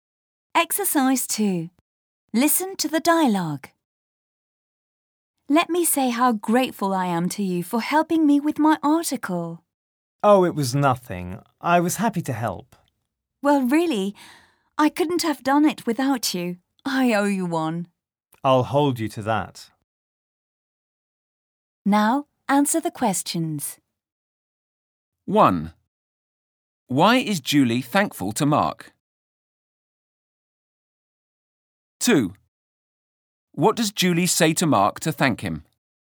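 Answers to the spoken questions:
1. Because he helped her with her article.
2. Let me say how grateful I am to you for helping me with my article; I owe you one.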